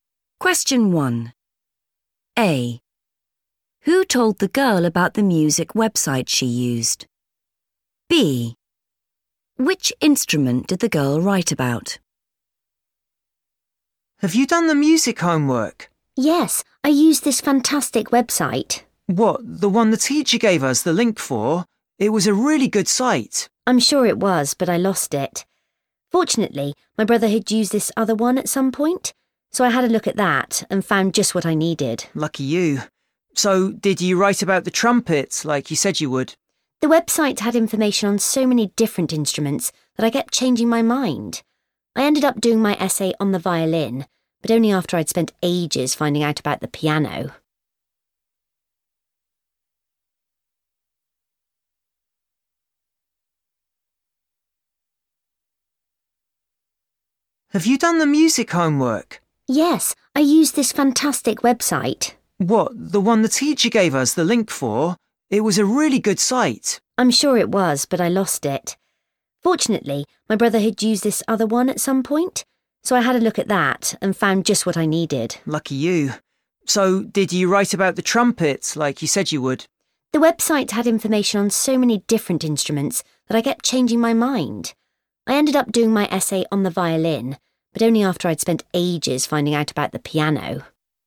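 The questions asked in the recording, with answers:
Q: Who told the girl about the music website she used?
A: her brother

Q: Which instrument did the girl write about?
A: the violin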